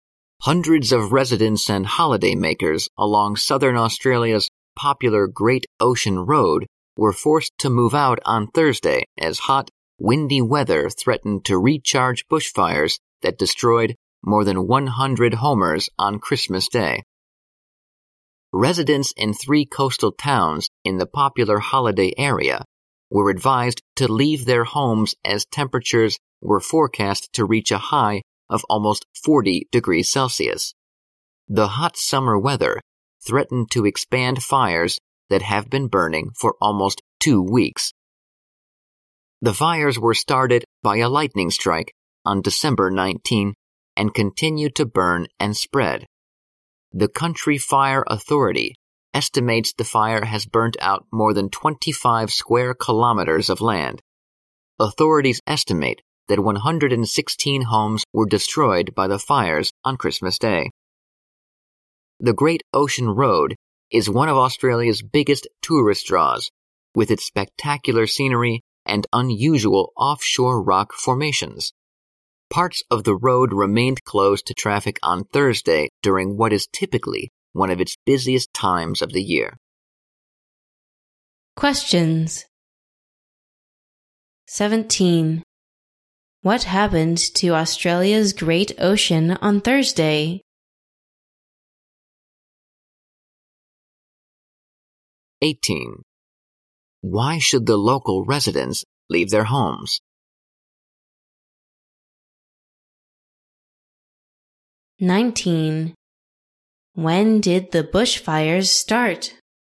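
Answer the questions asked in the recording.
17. Hundreds of residents and holidaymakers were forced to move out
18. Hot, windy weather threatened to recharge the bushfires
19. On December 19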